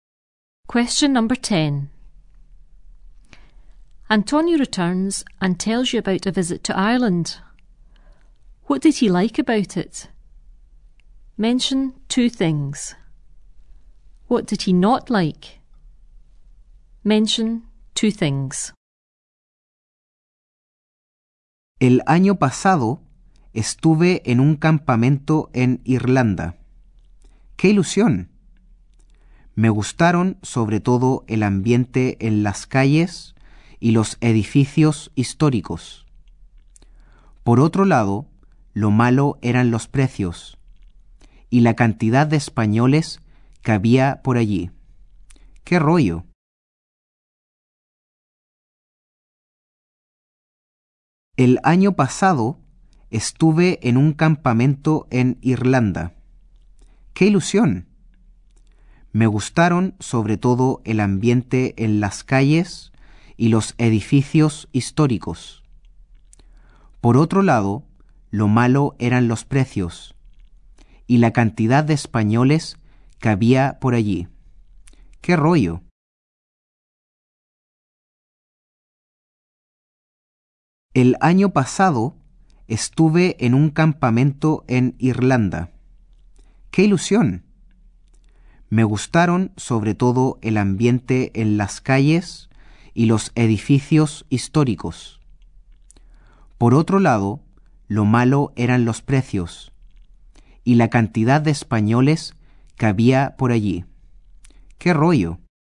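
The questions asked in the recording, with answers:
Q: What did he like about it?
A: The atmosphere in the streets and the historic buildings

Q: What did he not like?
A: The prices and the number of Spanish people there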